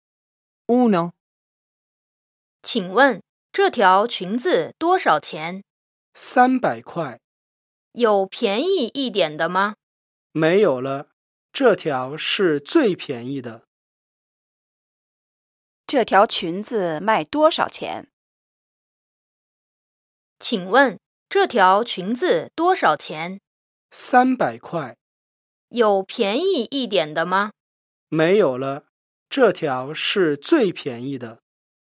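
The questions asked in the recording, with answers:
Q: 这条裙子卖多少钱?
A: 300块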